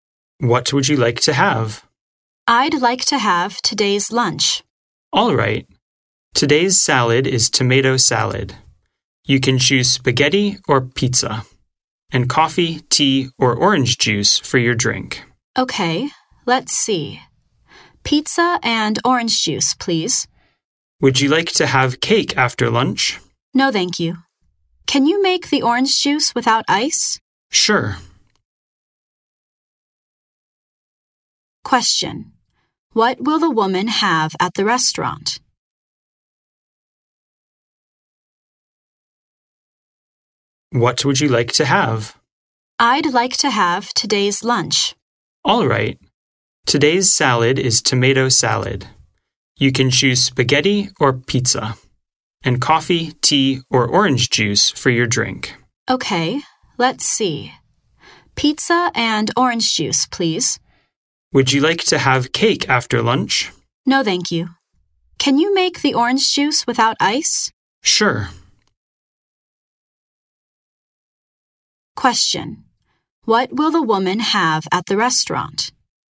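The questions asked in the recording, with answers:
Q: What will the woman have at the restaurant?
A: Today's lunch: tomato salad, pizza and orange juice without ice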